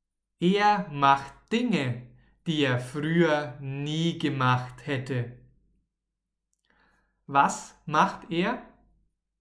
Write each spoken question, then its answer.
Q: Was macht er?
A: Dinge, die er früher nie gemacht hätte.